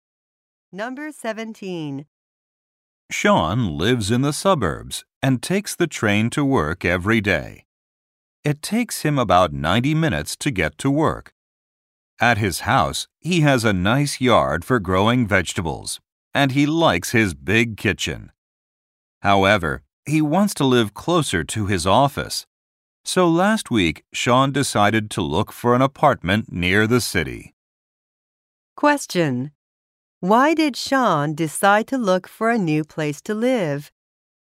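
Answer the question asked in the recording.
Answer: He wants to live closer to his office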